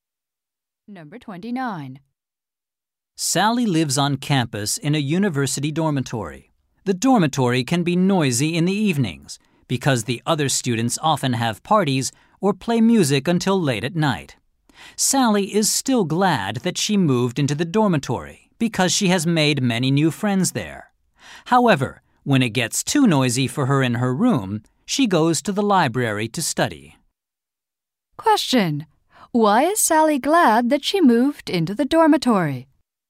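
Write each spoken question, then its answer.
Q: Why is Sally glad that she moved into the dormitory?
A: She has made many new friends there.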